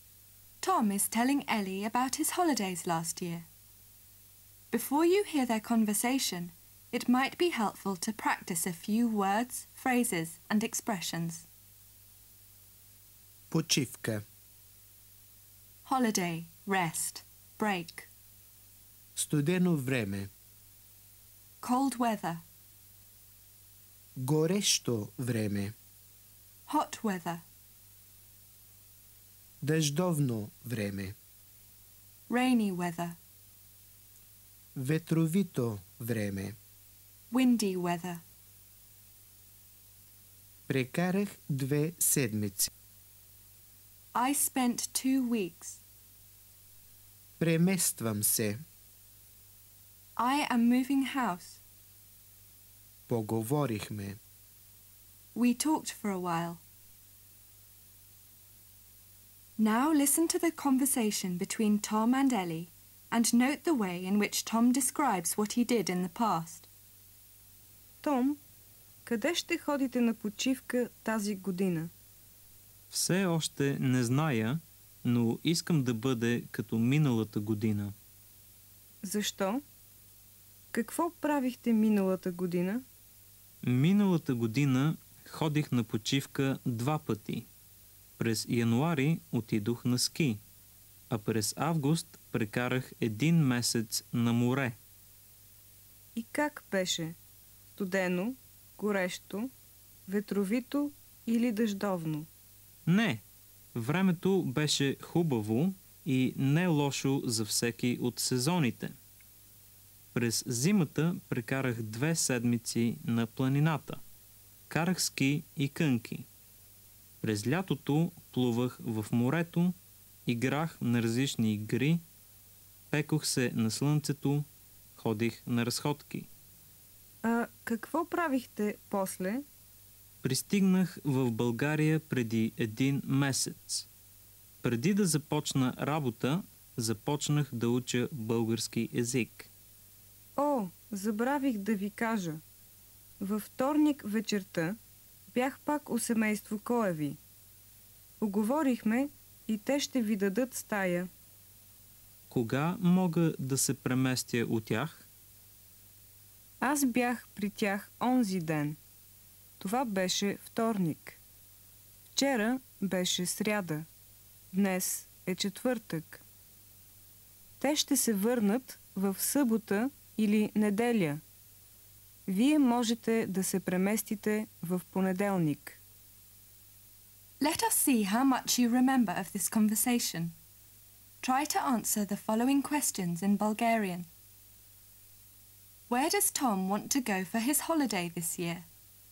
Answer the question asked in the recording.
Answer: Tom все още не знае.